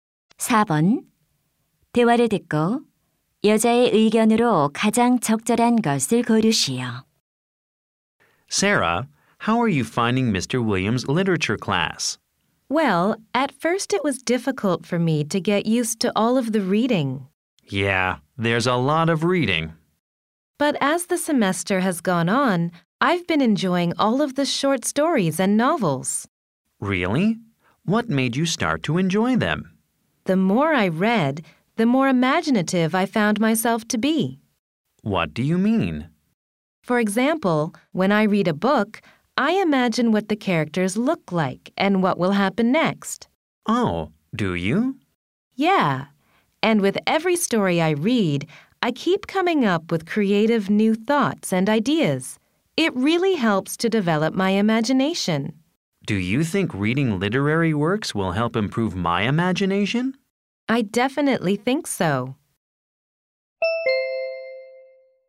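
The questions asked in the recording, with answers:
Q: 대화를 듣고 여자의 의견으로 가장 적절한 것을 고르시오.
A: 문학 작품 읽기는 상상력 발달에 도움이 된다.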